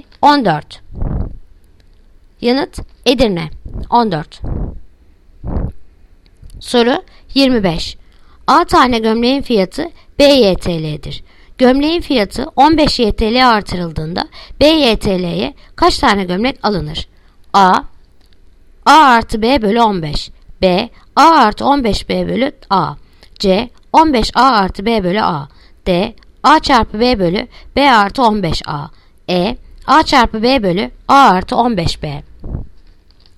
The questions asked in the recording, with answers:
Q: Gömleğin fiyatı 15 YTL artırıldığında B YTL'ye kaç tane gömlek alınır?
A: Yanıt Diyarbakır A çarpı B bölü B artı 15 A